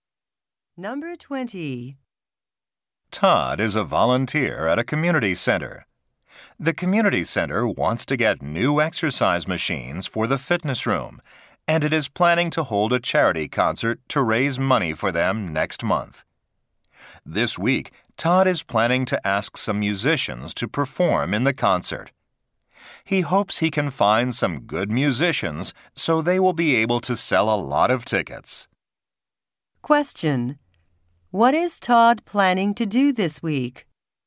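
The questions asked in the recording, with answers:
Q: What is Todd planning to do this week?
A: Ask musicians to perform in the charity concert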